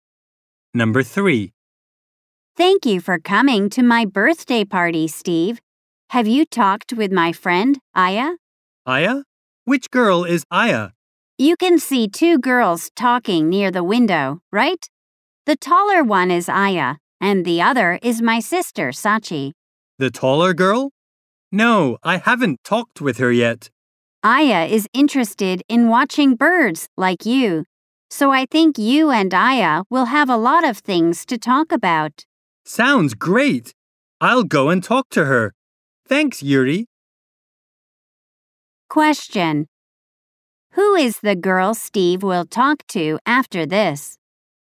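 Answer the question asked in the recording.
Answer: Aya, the taller girl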